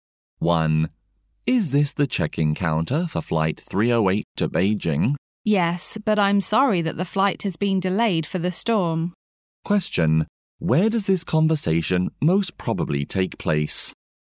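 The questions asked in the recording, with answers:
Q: Where does this conversation most probably take place?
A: At an airport check-in counter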